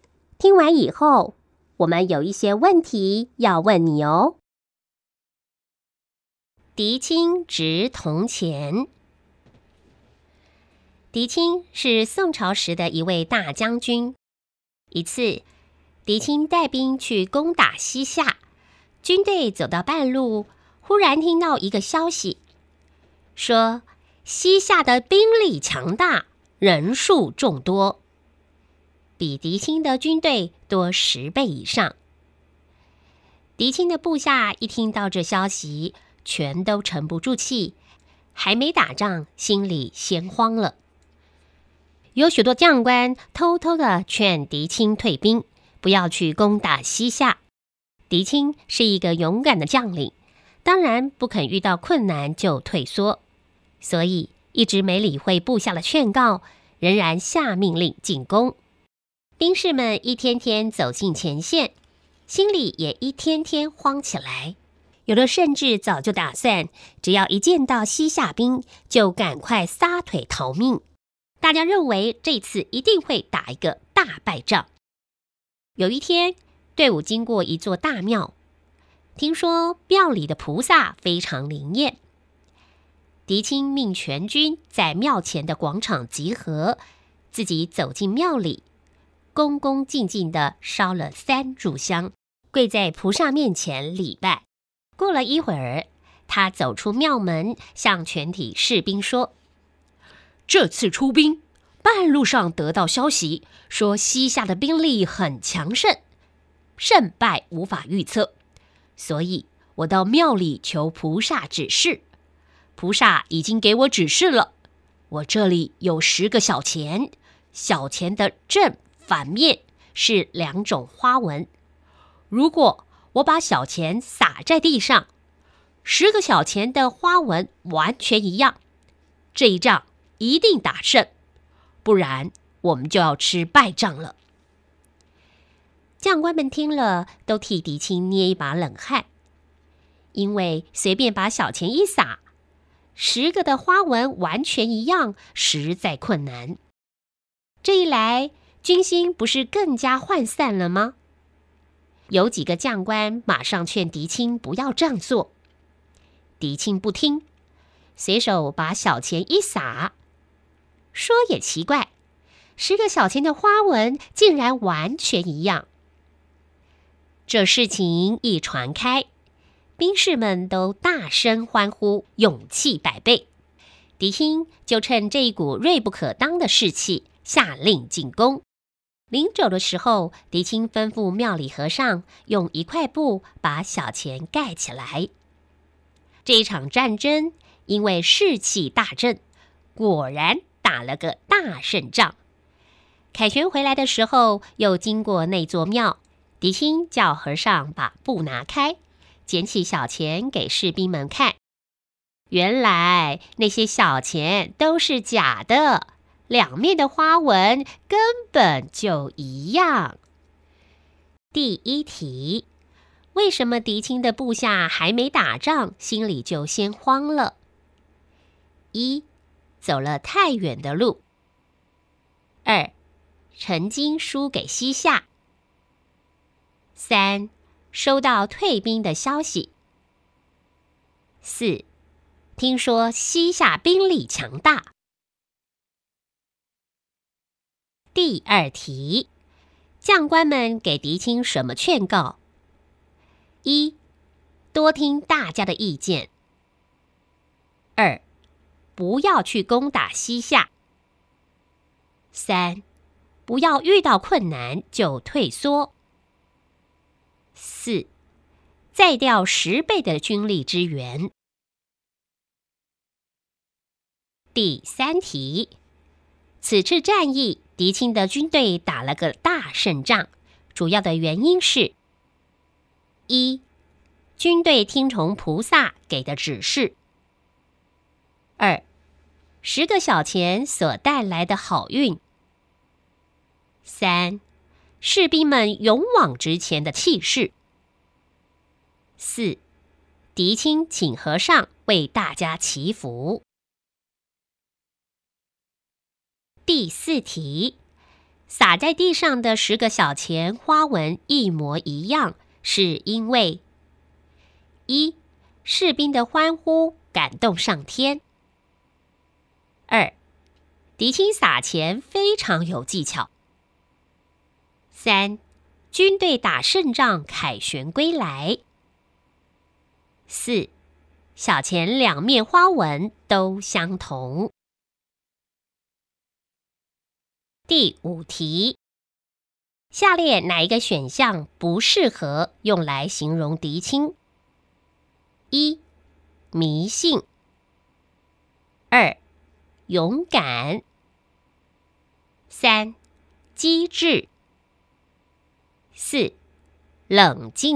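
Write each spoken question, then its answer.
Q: 为什么狄青的部下还没打仗,心里就先慌了?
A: 4: 听说西夏兵力强大

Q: 将官们给狄青什么劝告?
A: 2: 不要去攻打西夏

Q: 此次战役狄青的军队打了个大胜仗,主要的原因是:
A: 3: 士兵们勇往直前的气势

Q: 撒在地上的10个小钱花纹一模一样,是因为:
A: 4: 小钱两面花纹都相同

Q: 下列哪一个选项不适合用来形容狄青?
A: 1: 迷信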